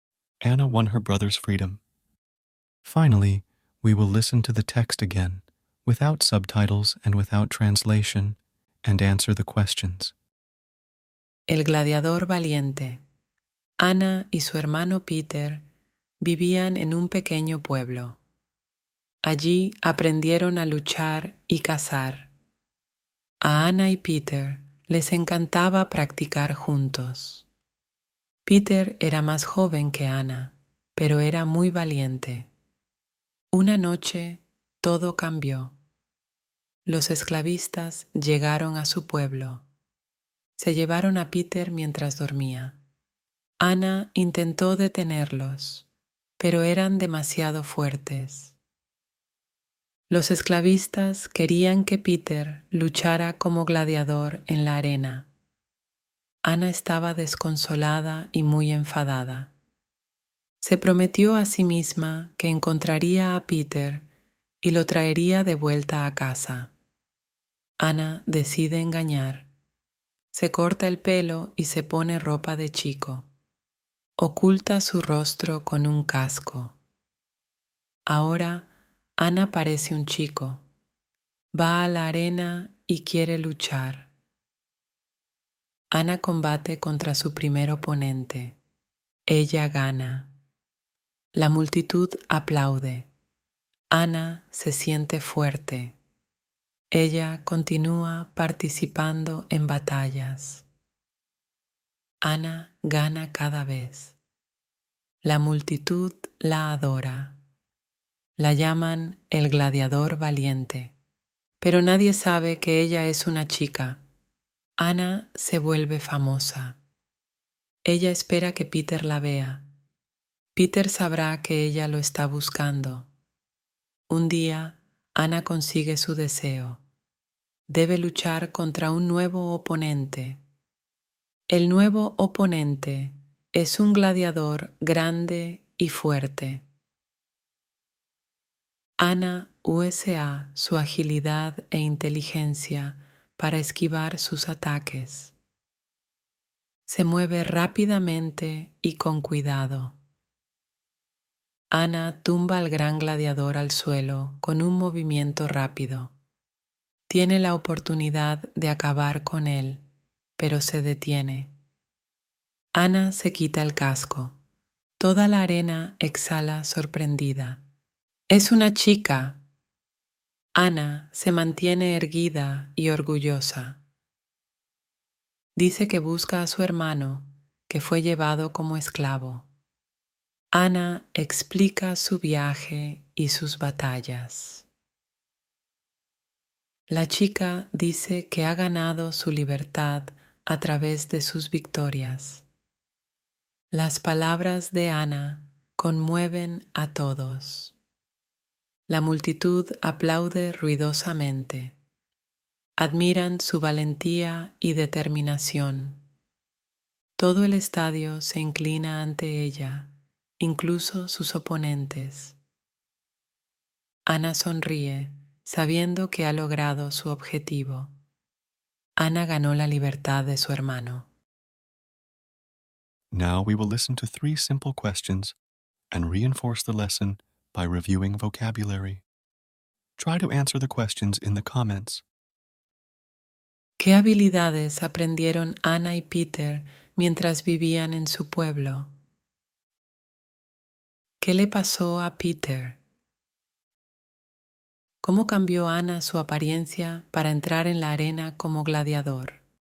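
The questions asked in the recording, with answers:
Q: ¿Qué habilidades aprendieron Ana y Peter mientras vivían en su pueblo?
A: Aprendieron a luchar y cazar.

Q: ¿Qué le pasó a Peter?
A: Los esclavistas se lo llevaron mientras dormía para que luchara como gladiador en la arena.

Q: ¿Cómo cambió Ana su apariencia para entrar en la arena como gladiador?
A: Se cortó el pelo, se puso ropa de chico y ocultó su rostro con un casco.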